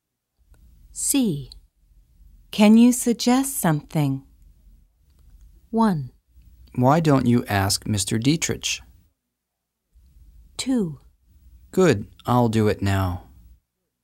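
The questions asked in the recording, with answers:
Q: Can you suggest something?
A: 1: Why don't you ask Mr. Dietrich?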